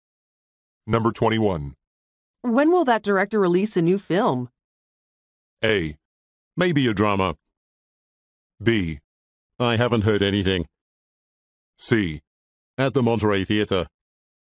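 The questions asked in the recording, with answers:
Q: When will that director release a new film?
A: B: I haven't heard anything.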